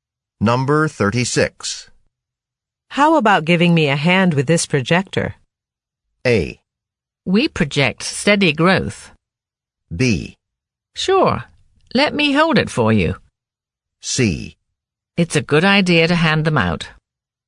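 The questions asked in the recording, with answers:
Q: How about giving me a hand with this projector?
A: B: Sure, let me hold it for you.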